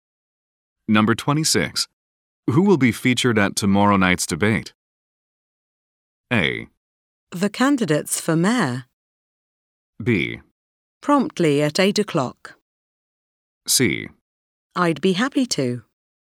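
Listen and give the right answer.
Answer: A: The candidates for mayor.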